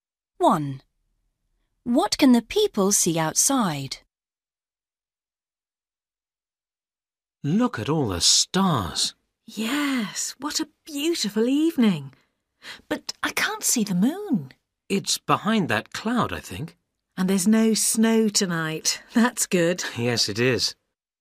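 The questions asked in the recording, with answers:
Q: What can the people see outside?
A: The stars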